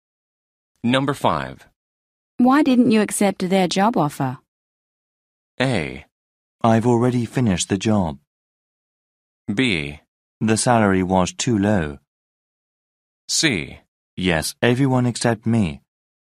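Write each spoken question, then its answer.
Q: Why didn't you accept their job offer?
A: B: The salary was too low.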